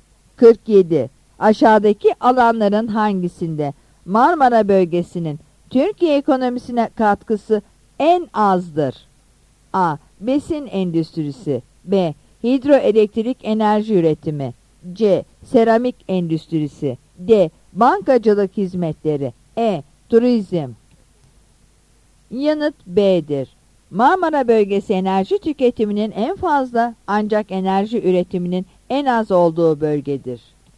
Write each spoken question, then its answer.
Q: Aşağıdaki alanların hangisinde Marmara bölgesinin Türkiye ekonomisine katkısı en azdır?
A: Yanıt B'dir.